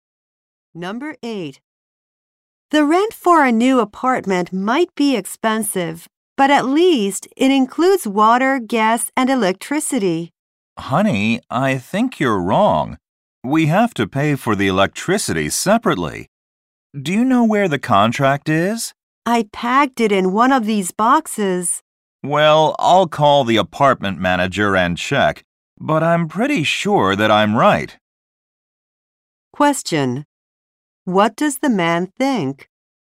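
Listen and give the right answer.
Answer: They must pay for electricity separately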